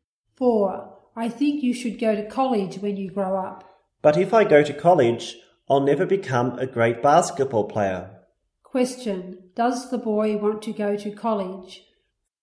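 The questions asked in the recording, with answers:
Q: Does the boy want to go to college?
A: No.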